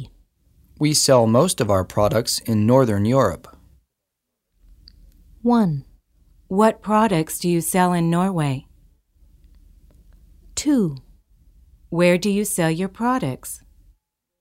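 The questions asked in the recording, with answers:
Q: We sell most of our products in Northern Europe.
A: 2: Where do you sell your products?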